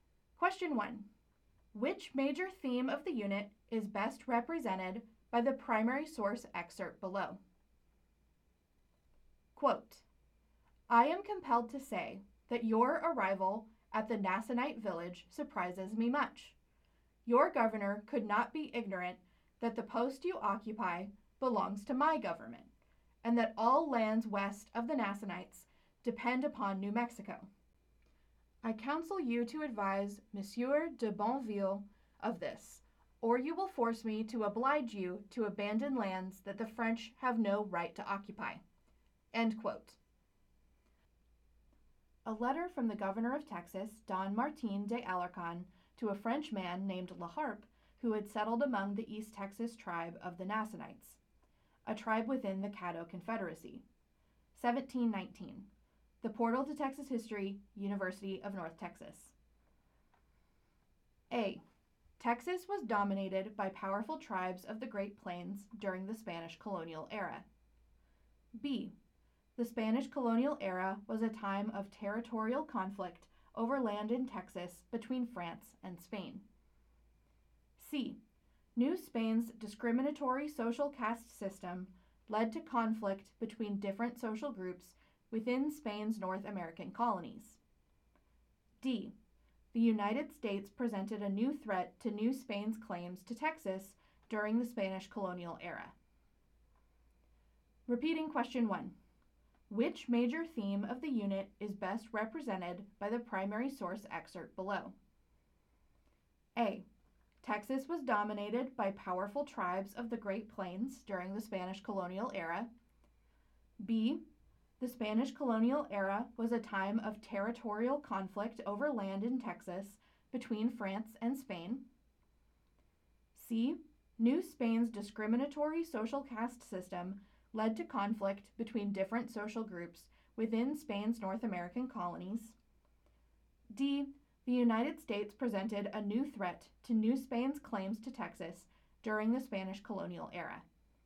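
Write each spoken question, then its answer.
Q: Which major theme of the unit is best represented by the primary source excerpt below?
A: B: The Spanish colonial era was a time of territorial conflict over land in Texas between France and Spain.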